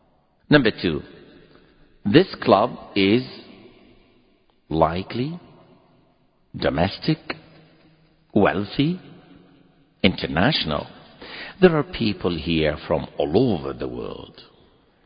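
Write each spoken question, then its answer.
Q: This club is likely domestic, wealthy, international.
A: C: international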